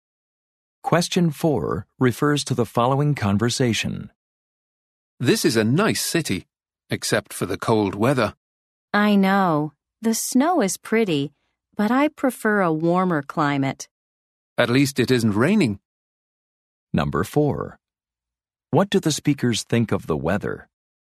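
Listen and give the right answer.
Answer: It is too cold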